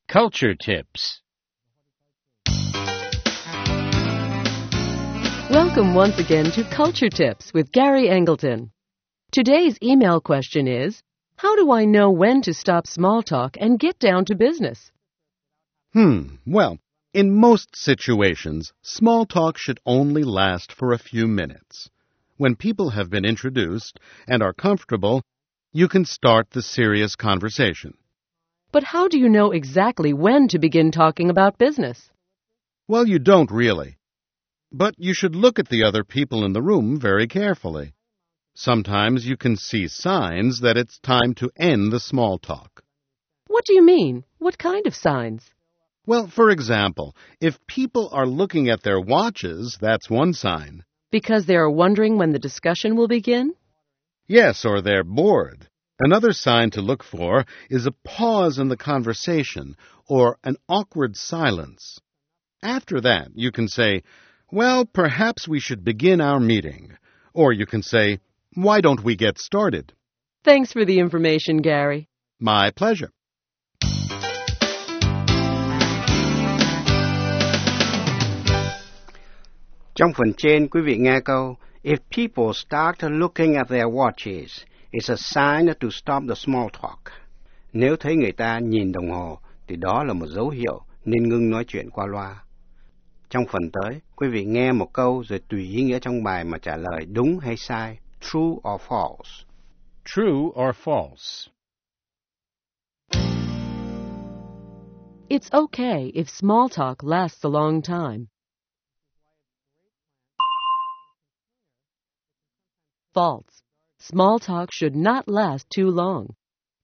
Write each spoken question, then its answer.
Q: If people start looking at their watches, it's a sign to stop the small talk.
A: True. They may want to begin talking about business.